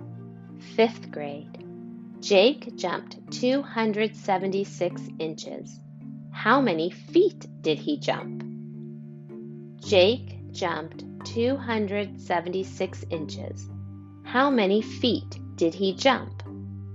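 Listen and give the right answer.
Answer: 23 feet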